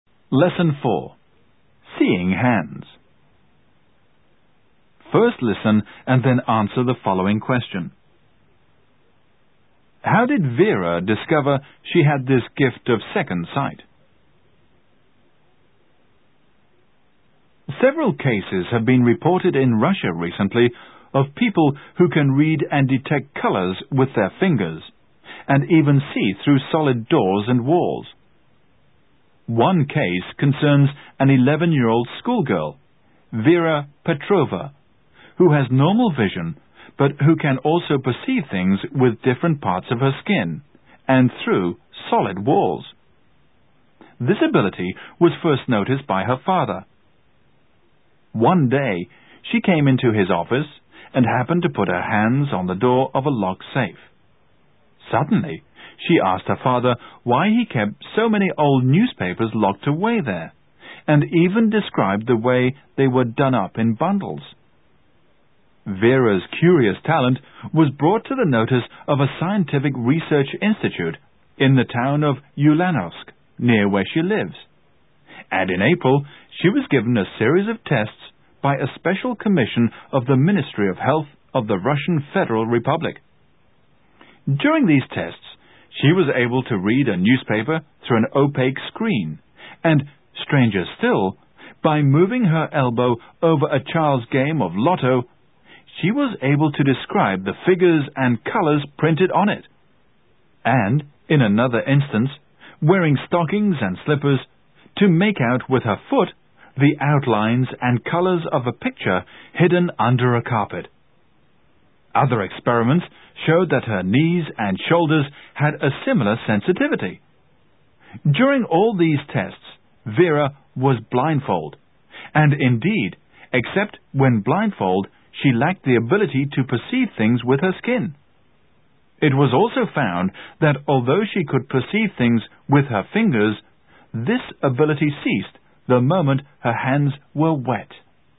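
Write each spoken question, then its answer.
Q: How did Vera discover she had this gift of second sight?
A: She put her hands on the door of her father's locked safe and described the old newspapers inside.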